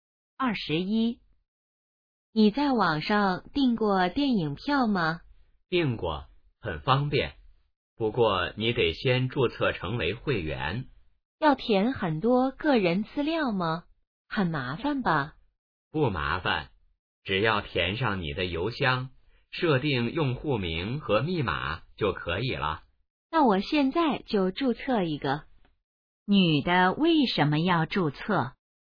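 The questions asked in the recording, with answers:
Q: 女的为什么要注册?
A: 想在网上订电影票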